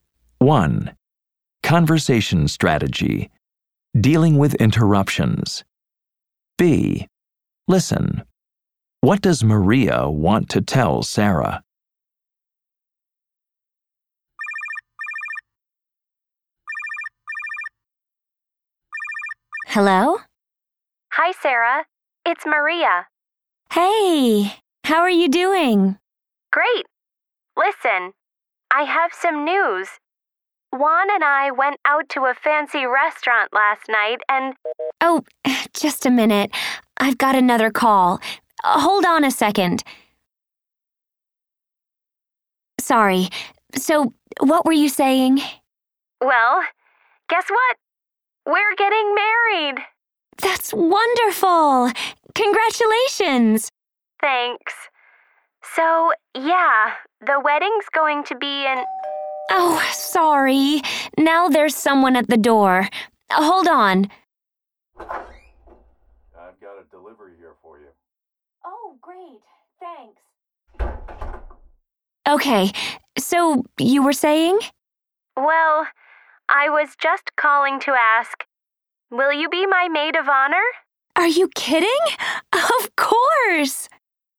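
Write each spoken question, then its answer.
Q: What does Maria want to tell Sarah?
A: She and Juan are getting married, and she wants Sarah to be her maid of honor.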